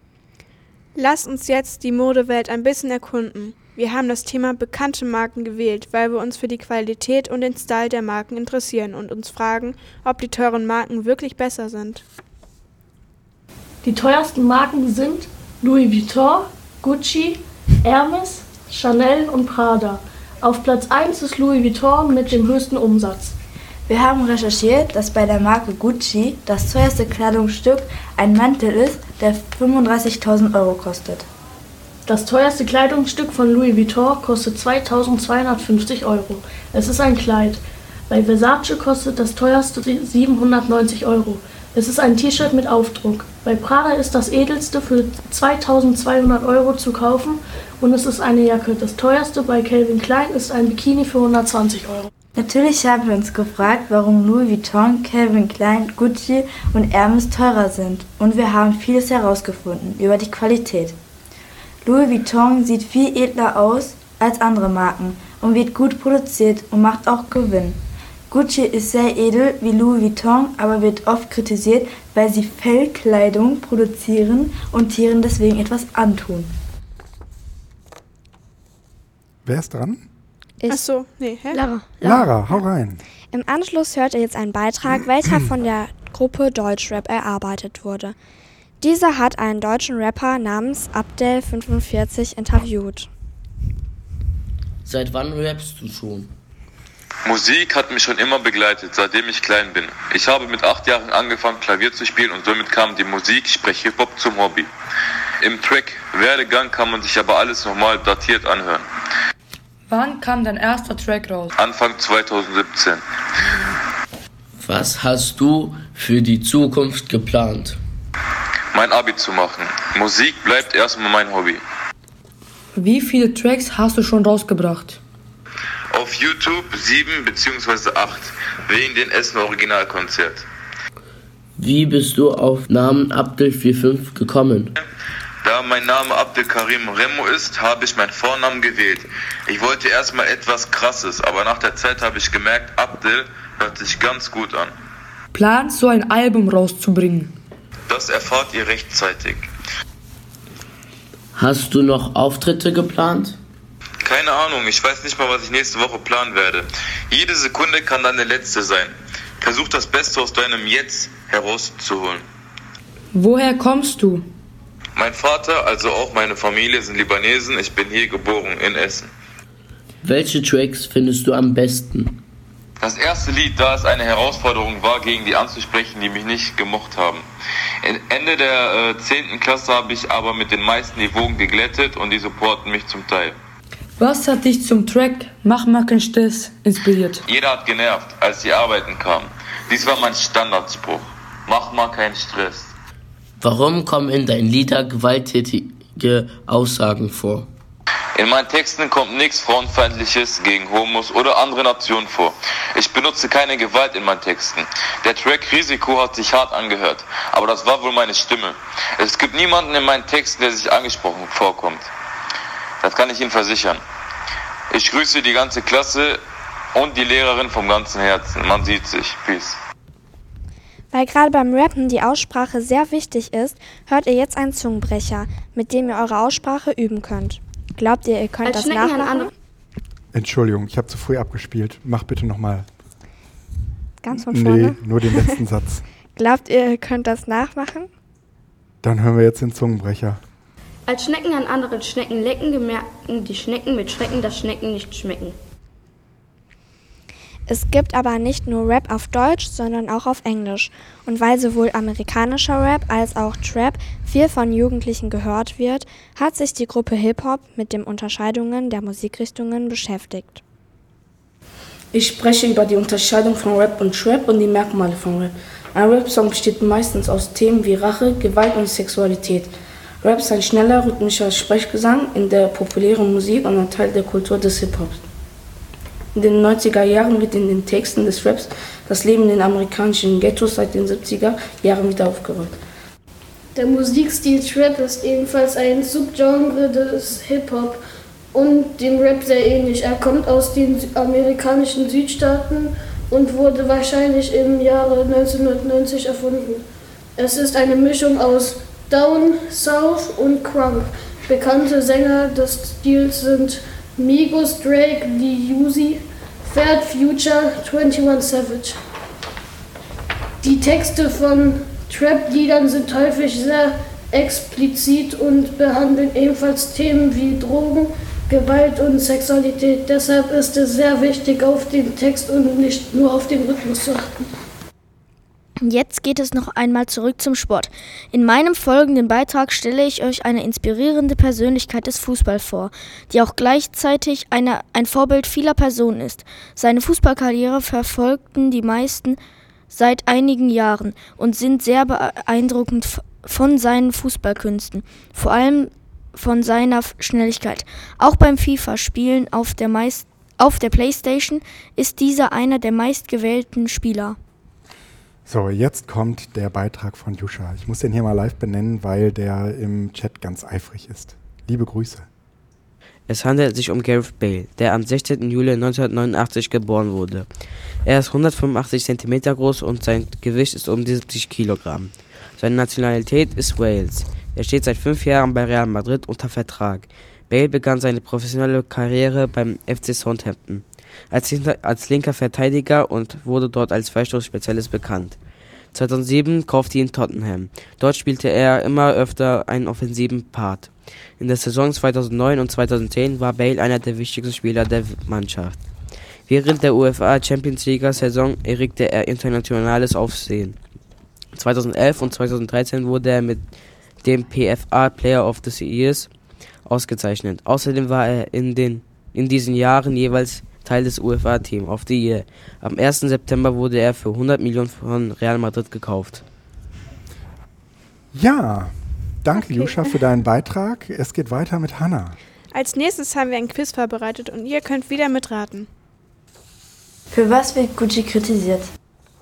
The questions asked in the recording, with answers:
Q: Für was wird Gucci kritisiert?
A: Für hohe Preise und für Pelzkleidung.